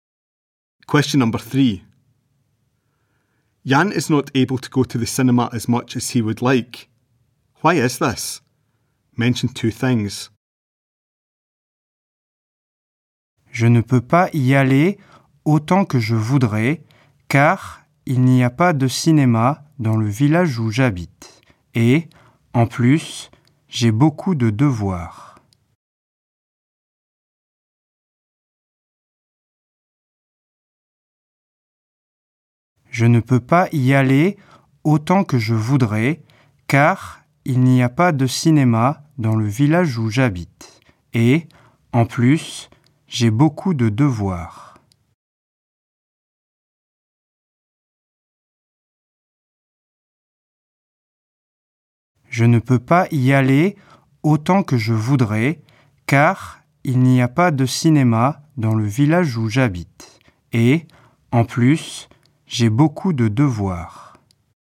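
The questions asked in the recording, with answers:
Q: Why is this? Mention 2 things.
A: No cinema in his village; he has a lot of homework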